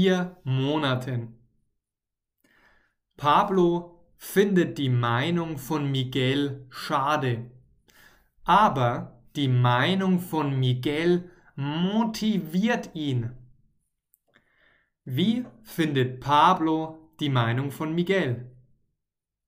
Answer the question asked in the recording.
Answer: Schade. Er findet die Meinung von Miguel sehr, sehr schade.